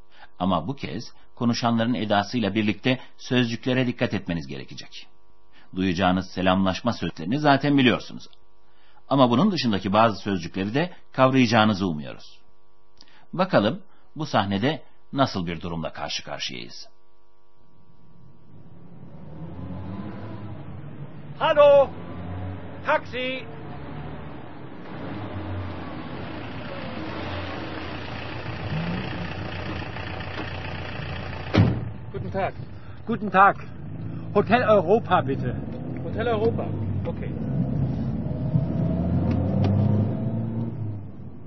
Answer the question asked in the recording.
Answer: Caddede duran bir adam bir taksi durduruyor.